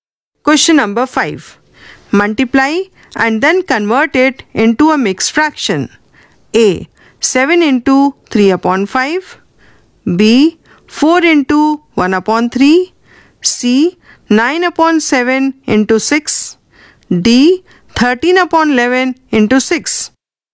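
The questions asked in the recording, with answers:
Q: A. 7 into 3 upon 5.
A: 4 1/5

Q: B. 4 into 1 upon 3.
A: 1 1/3

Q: C. 9 upon 7 into 6.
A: 7 5/7

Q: D. 13 upon 11 into 6.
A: 7 1/11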